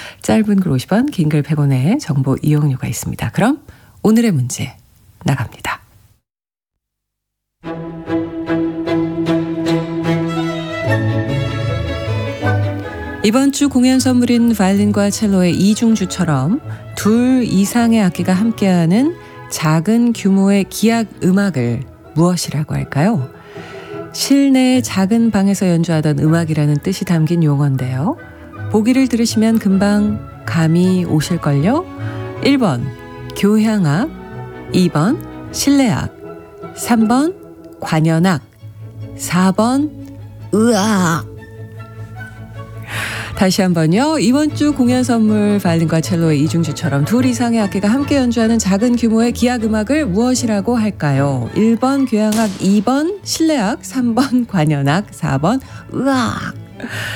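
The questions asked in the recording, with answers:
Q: 이번 주 공연 선물인 바이올린과 첼로의 이중주처럼 둘 이상의 악기가 함께하는 작은 규모의 기악 음악을 무엇이라고 할까요?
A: 2번: 실내악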